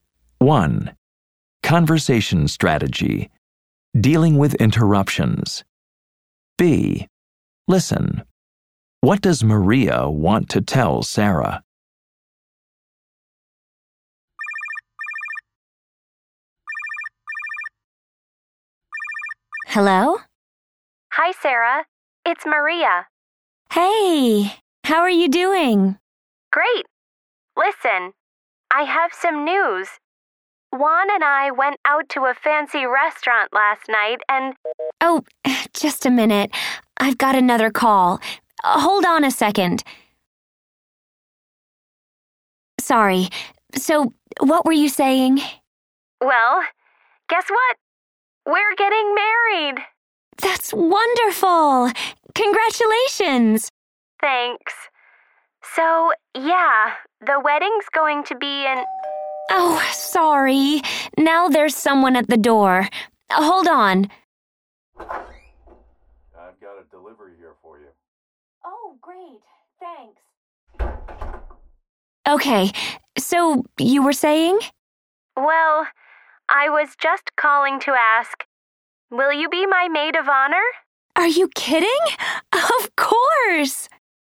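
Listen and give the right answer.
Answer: She and Juan are getting married, and she wants Sarah to be her maid of honor.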